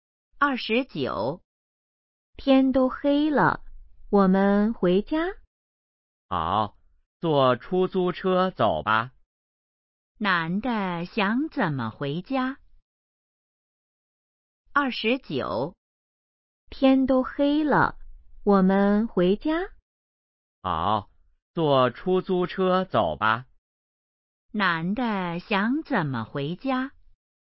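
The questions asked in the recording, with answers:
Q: 男的想怎么回家?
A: 坐出租车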